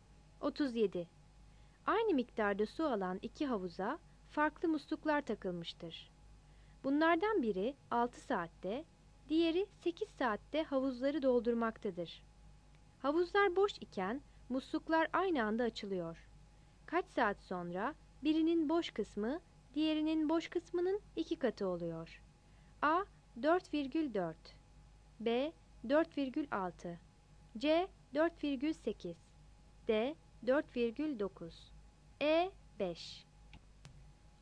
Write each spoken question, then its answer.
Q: Kaç saat sonra birinin boş kısmı diğerinin boş kısmının 2 katı oluyor.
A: 37 C